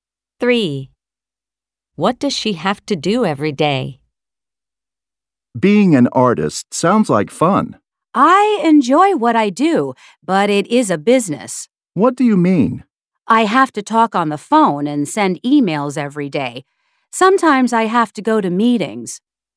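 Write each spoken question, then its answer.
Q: What does she have to do every day?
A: Talk on the phone and send emails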